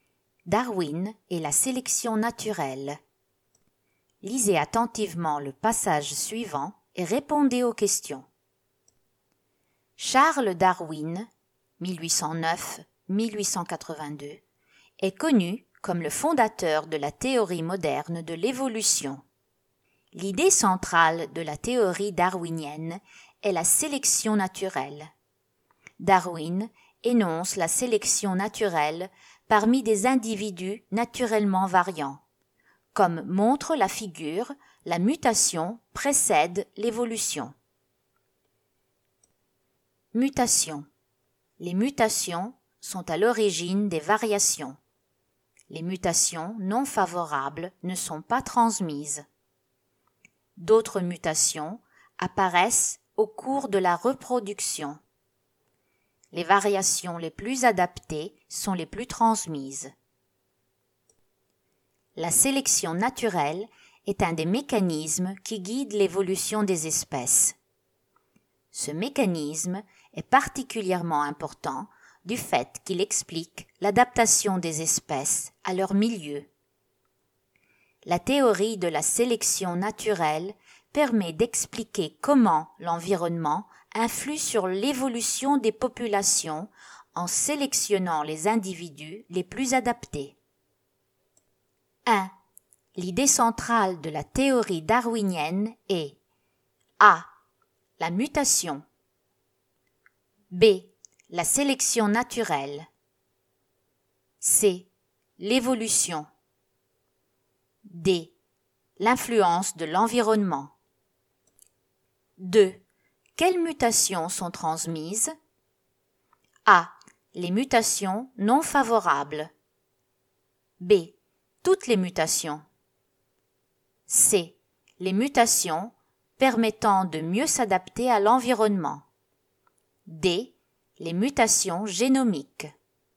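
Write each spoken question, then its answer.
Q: L'idée centrale de la théorie darwinienne est A.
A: B: La sélection naturelle

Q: Quelles mutations sont transmises?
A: C: Les mutations permettant de mieux s'adapter à l'environnement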